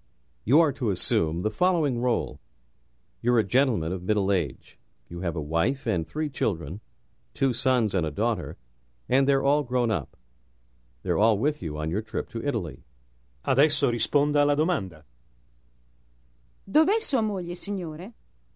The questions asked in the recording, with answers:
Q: Dov'è sua moglie, signore?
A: È qui. Mia moglie è qui in Italia con me.